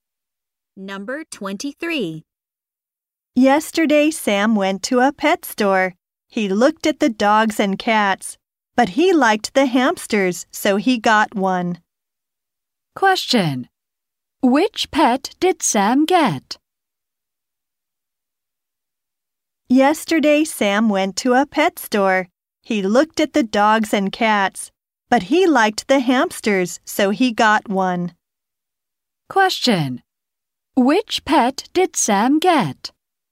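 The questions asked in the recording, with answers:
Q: Which pet did Sam get?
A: A hamster.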